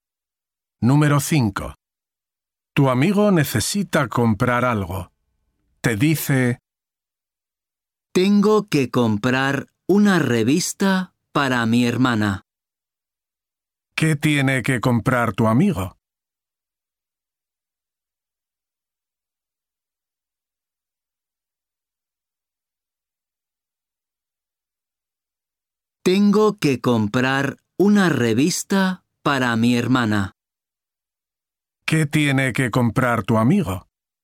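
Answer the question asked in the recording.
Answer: una revista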